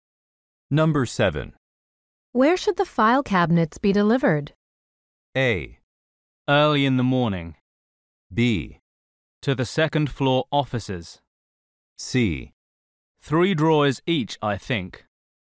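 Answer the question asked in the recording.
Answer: B: To the second floor offices.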